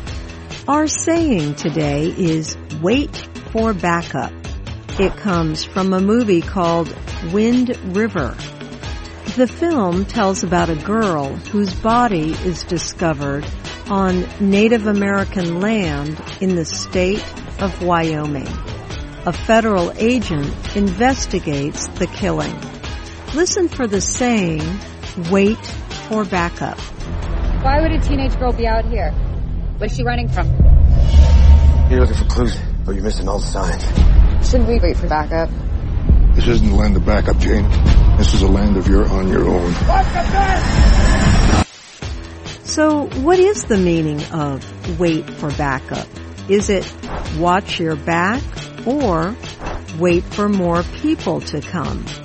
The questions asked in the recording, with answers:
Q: So, what is the meaning of wait for backup? Is it watch your back or wait for more people to come?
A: Wait for backup means wait for more people to come.